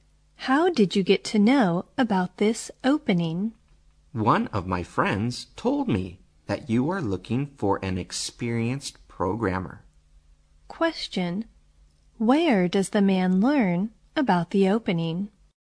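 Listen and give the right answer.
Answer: From one of his friends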